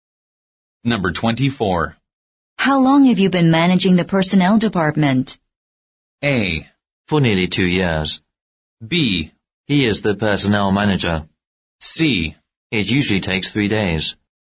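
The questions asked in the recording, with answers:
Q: How long have you been managing the personnel department?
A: A: For nearly 2 years.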